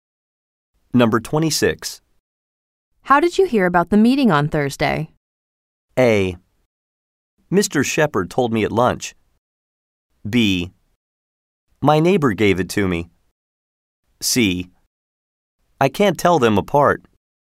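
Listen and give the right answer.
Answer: A: Mr. Shepherd told me at lunch.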